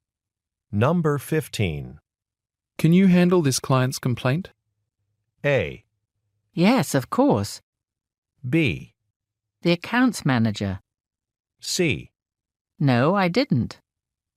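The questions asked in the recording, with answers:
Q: Can you handle this client's complaint?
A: A: Yes, of course.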